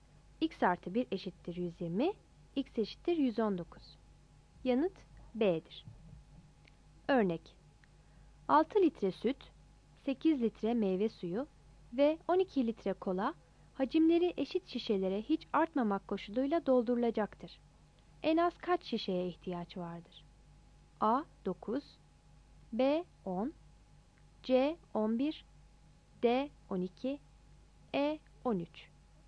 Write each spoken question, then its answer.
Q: En az kaç şişeye ihtiyaç vardır?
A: Kullanılacak şişe sayısı 6 artı 8 artı 12 bölü 2 eşittir 13'tür. Yanıt E'dir.